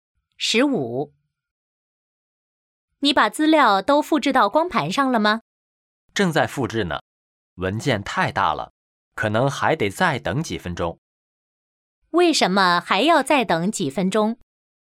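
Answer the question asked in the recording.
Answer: 文件太大了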